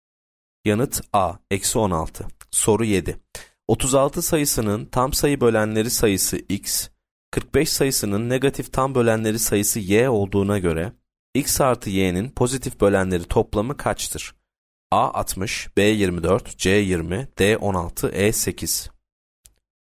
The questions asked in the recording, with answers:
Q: 36 sayısının tam sayı bölenleri sayısı x, 45 sayısının negatif tam bölenleri sayısı y olduğuna göre x artı y'nin pozitif bölenleri toplamı kaçtır?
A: Yanıt A 60.